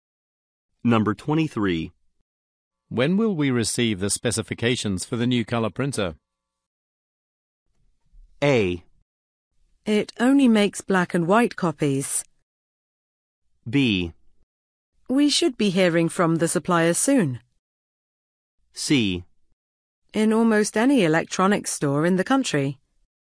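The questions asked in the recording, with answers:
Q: When will we receive the specifications for the new color printer?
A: B: We should be hearing from the supplier soon.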